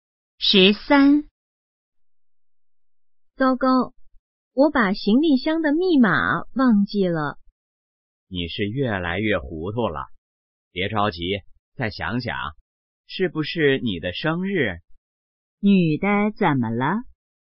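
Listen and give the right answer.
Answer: 忘了行李箱的密码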